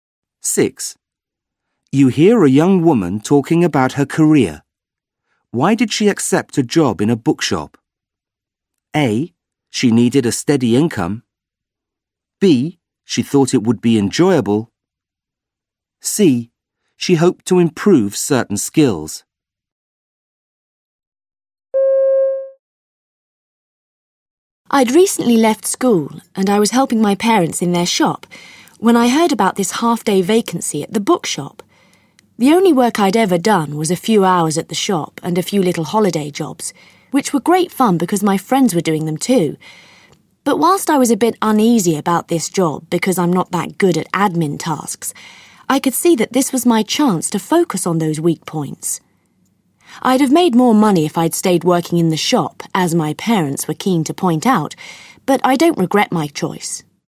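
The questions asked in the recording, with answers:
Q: Why did she accept a job in a bookshop?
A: C: She hoped to improve certain skills.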